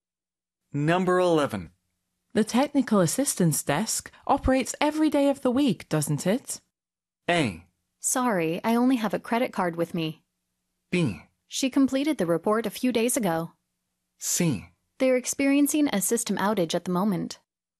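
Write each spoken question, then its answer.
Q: The technical assistance desk operates every day of the week, doesn't it?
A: C: They're experiencing a system outage at the moment.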